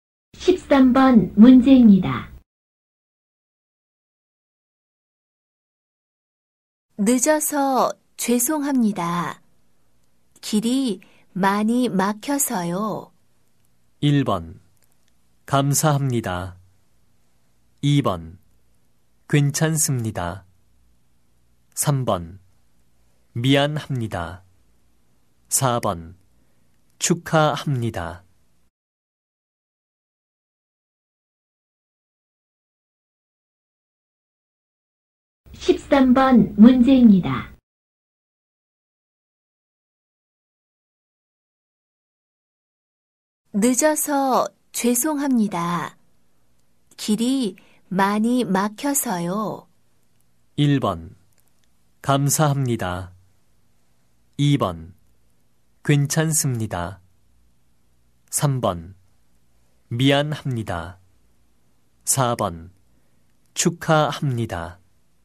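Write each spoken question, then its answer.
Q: 늦어서 죄송합니다. 길이 많이 막혀서요.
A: 2: 괜찮습니다.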